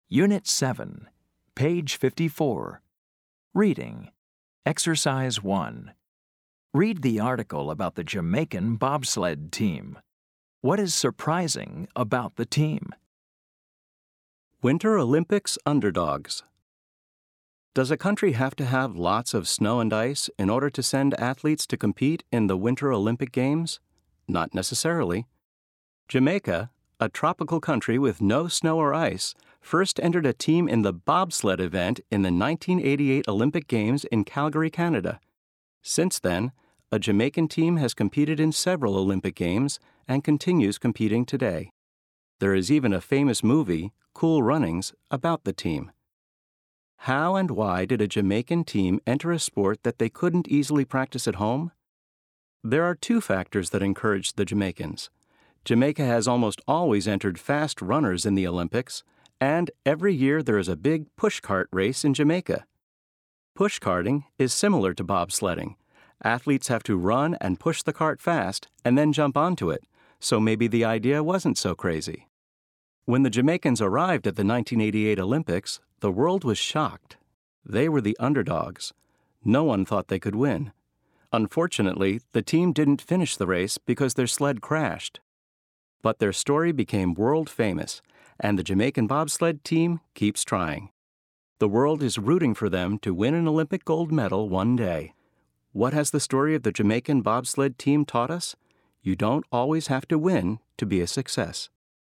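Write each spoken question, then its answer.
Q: What is surprising about the team?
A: Jamaica is a tropical country with no snow or ice, yet it sends a bobsled team to the Winter Olympics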